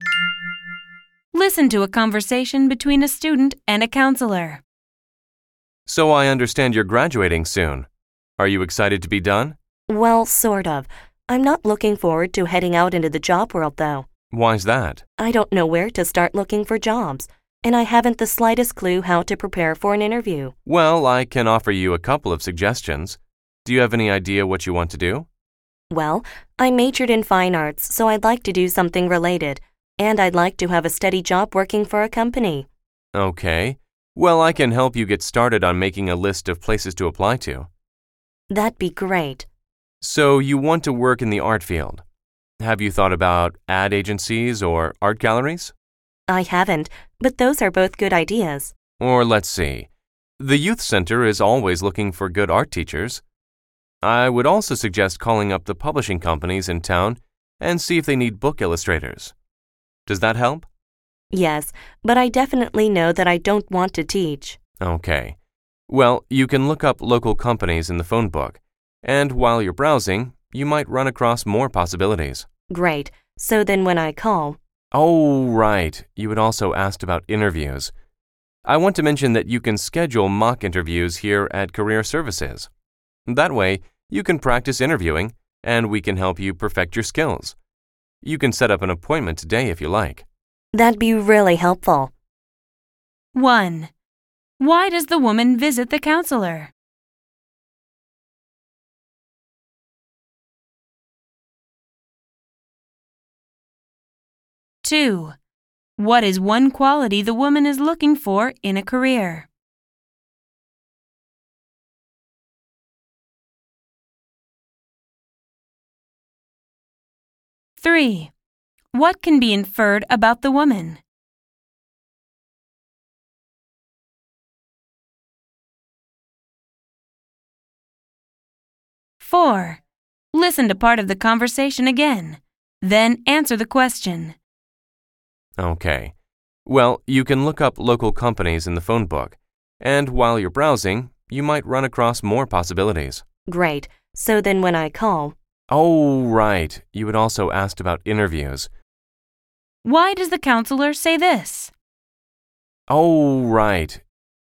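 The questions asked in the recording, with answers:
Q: Why does the woman visit the counselor?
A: She wants advice on finding a job and preparing for interviews

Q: What is one quality the woman is looking for in a career?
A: A steady job with a company, related to art

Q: Why does the counselor say this?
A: She remembers that she hasn't answered the student's question about interviews yet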